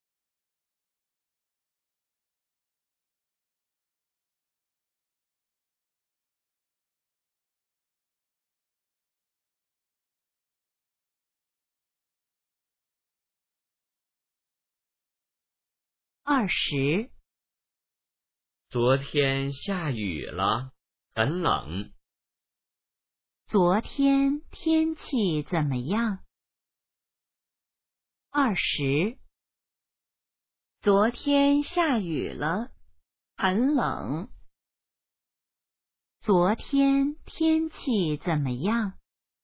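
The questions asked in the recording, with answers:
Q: 昨天天气怎么样?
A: 下雨了,很冷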